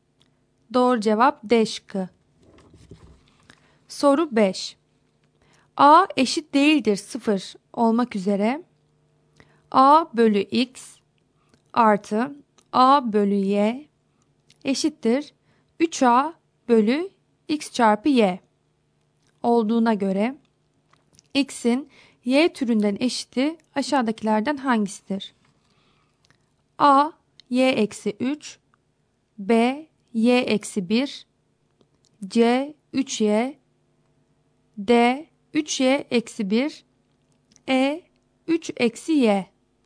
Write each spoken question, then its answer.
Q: A eşit değildir 0 olmak üzere A bölü x artı A bölü y eşittir 3A bölü x çarpı y olduğuna göre x'in y türünden eşiti aşağıdakilerden hangisidir?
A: Doğru cevap E şıkkı.